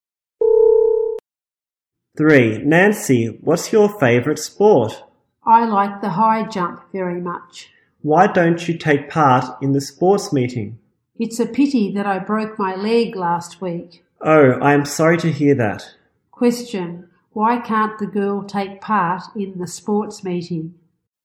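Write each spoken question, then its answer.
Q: Why can't the girl take part in the sports meeting?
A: She broke her leg last week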